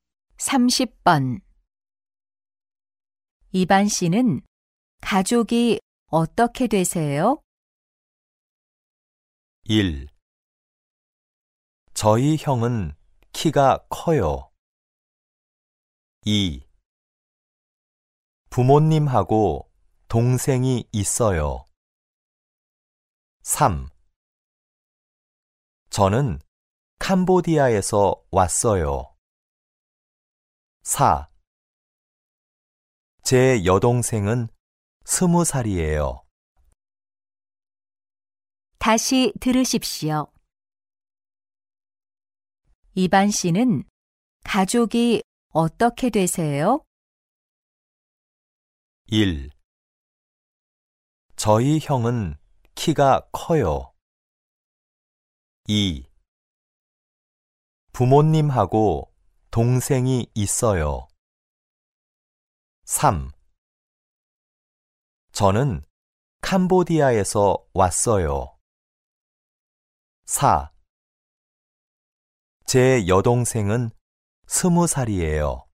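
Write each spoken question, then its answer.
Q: 이반 씨는 가족이 어떻게 되세요?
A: 2: 부모님하고 동생이 있어요.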